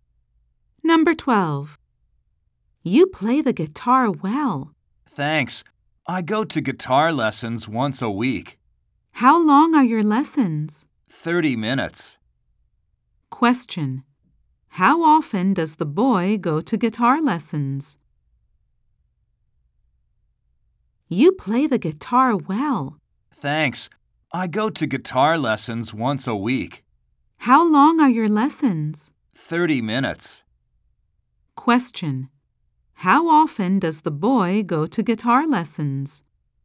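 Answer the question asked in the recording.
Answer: Once a week.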